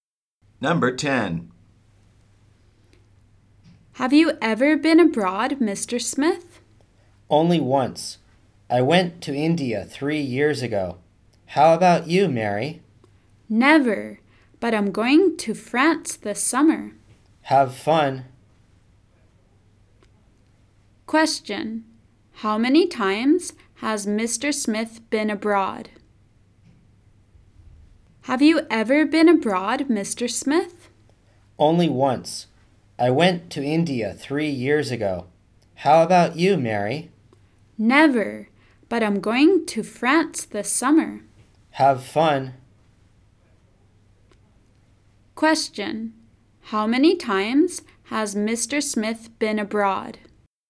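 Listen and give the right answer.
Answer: Once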